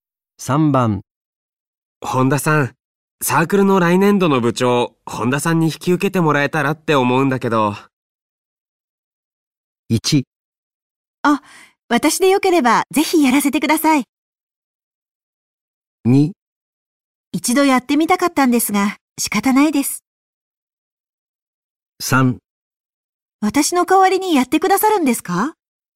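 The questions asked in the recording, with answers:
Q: 本田さん、サークルの来年度の部長、本田さんに引き受けてもらえたらって思うんだけど。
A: 1: あ、私でよければぜひやらせてください。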